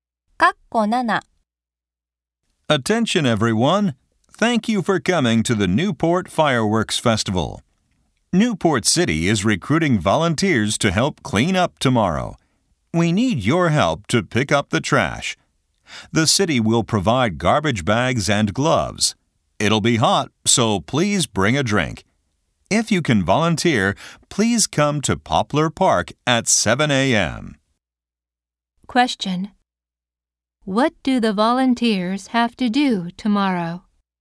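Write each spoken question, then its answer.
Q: What do the volunteers have to do tomorrow?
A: Pick up trash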